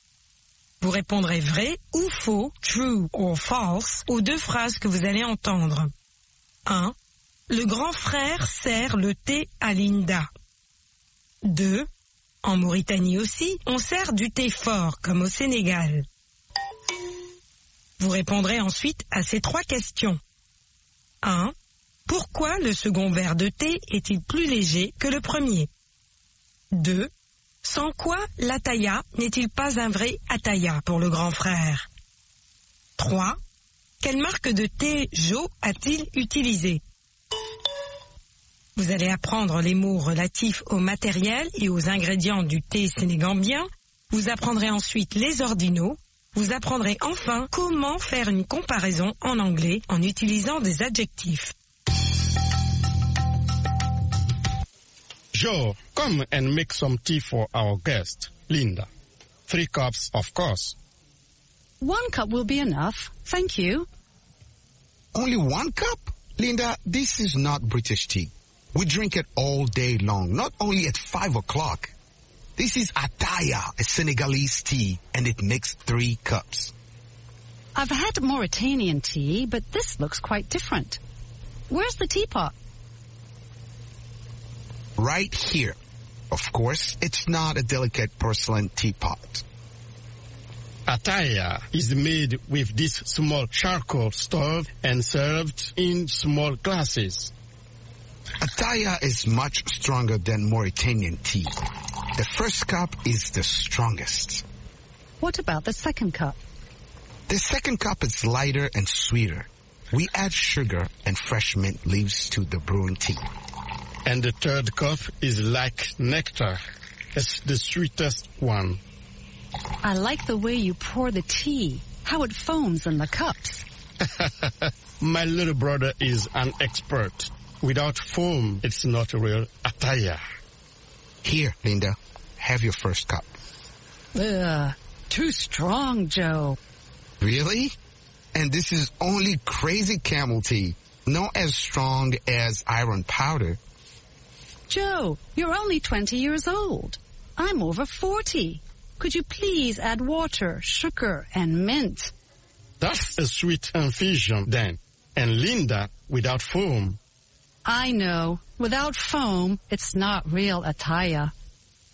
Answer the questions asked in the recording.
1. L'énoncé 1 est faux.
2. L'énoncé 2 est faux.
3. Il est plus sucré et parfumé aux feuilles de menthe fraîches.
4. Sans la mousse.
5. Crazy Camel.